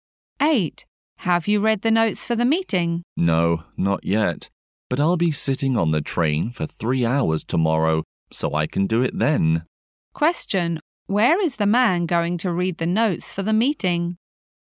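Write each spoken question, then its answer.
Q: Where is the man going to read the notes for the meeting?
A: On the train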